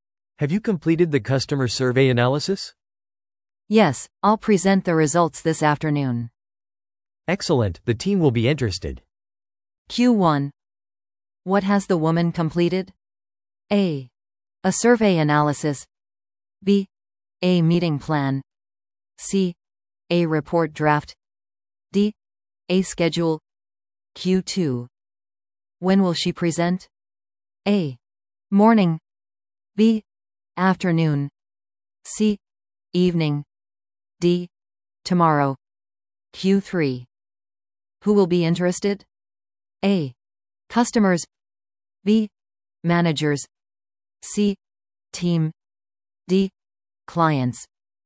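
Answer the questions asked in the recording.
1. A: A survey analysis.
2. B: Afternoon.
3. C: Team.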